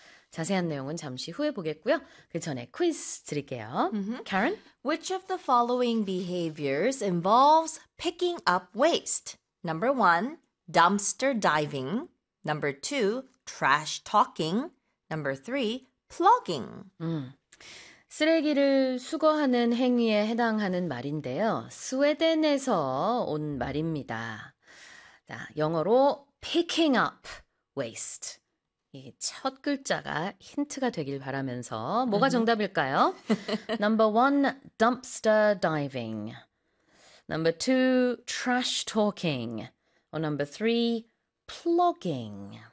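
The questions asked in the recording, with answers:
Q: Which of the following behaviors involves picking up waste?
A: Number three: plogging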